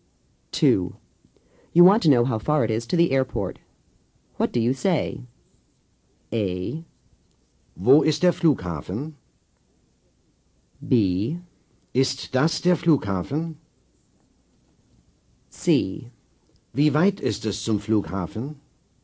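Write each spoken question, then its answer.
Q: You want to know how far it is to the airport. What do you say?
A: C: Wie weit ist es zum Flughafen?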